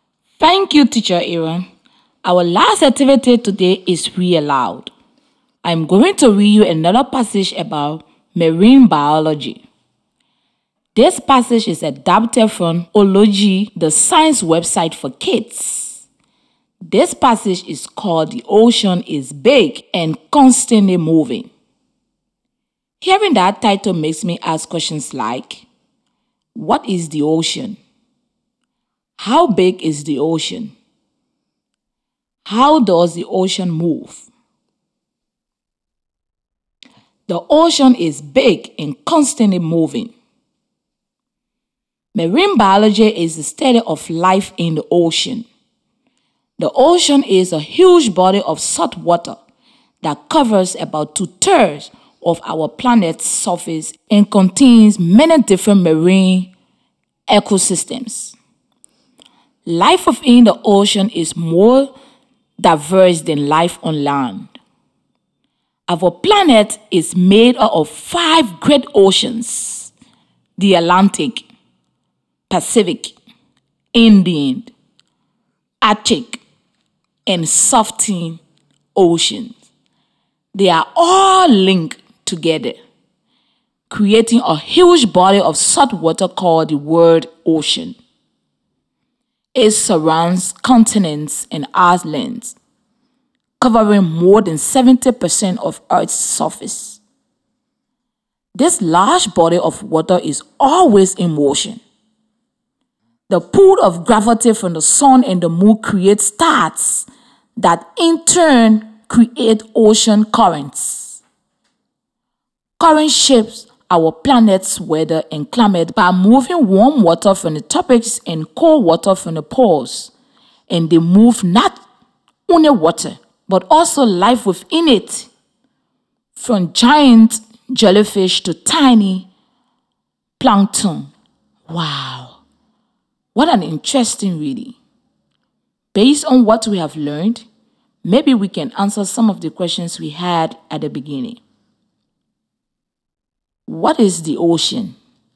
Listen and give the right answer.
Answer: the ocean is a huge body of water.